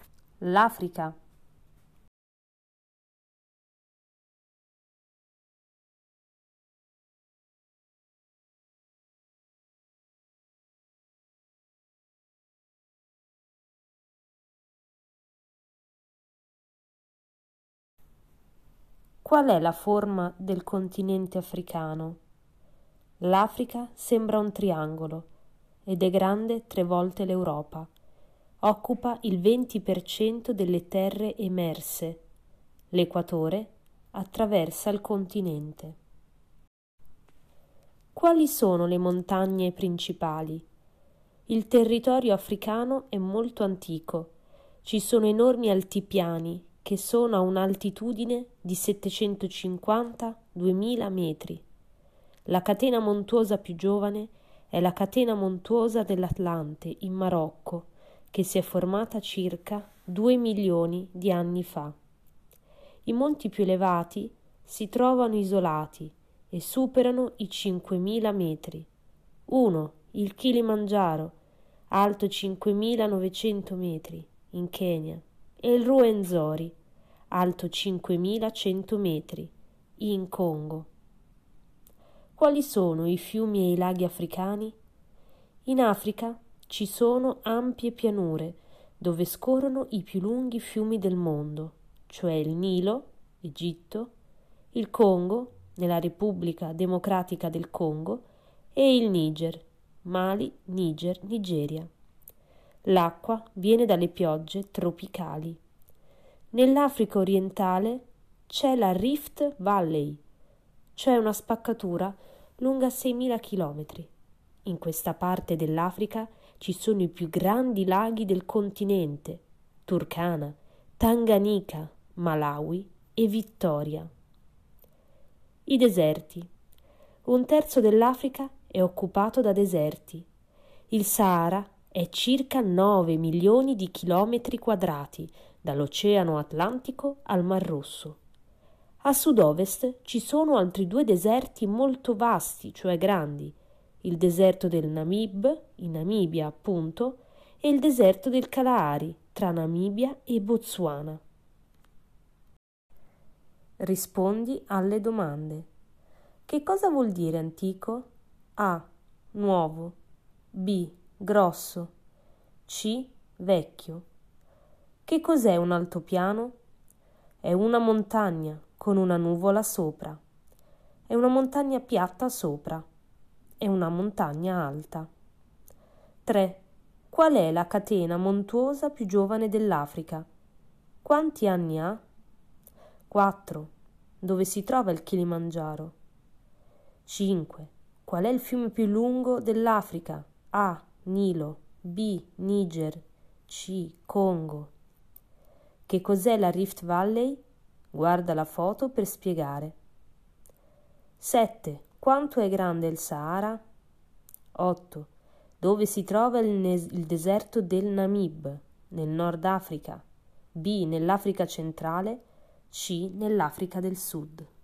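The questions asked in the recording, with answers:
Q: Qual è la catena montuosa più giovane dell'Africa?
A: La catena dell'Atlante, in Marocco

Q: Quanti anni ha?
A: Circa due milioni di anni

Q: Dove si trova il Kilimangiaro?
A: In Kenya

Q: Qual è il fiume più lungo dell'Africa?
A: A: Nilo

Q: Quanto è grande il Sahara?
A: Circa 9 milioni di chilometri quadrati

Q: Dove si trova il, nes- il deserto del Namib?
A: C: Nell'Africa del Sud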